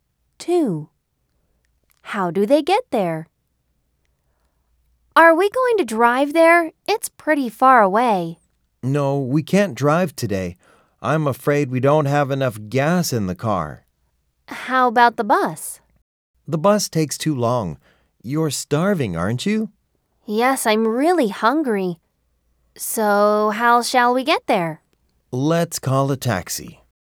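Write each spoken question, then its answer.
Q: How do they get there?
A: by taxi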